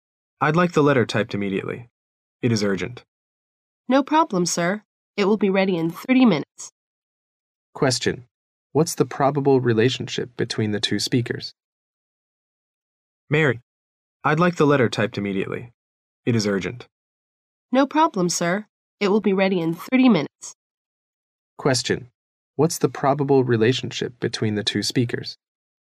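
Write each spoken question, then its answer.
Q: What's the probable relationship between the two speakers?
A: Boss and secretary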